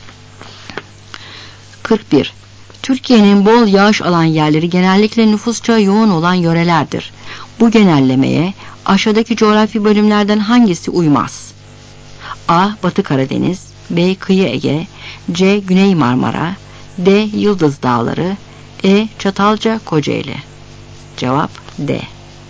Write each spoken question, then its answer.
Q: Bu genellemeye aşağıdaki coğrafi bölümlerden hangisi uymaz?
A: Cevap D.